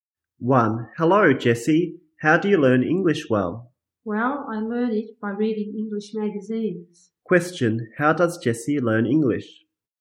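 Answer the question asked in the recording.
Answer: By reading English magazines.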